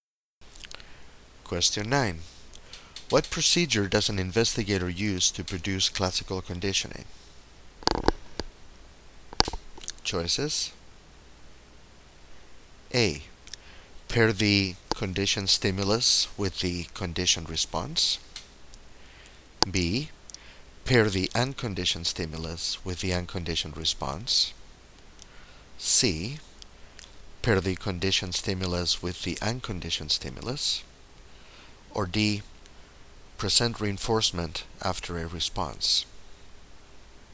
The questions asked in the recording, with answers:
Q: What procedure does an investigator use to produce classical conditioning?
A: The correct choice is C.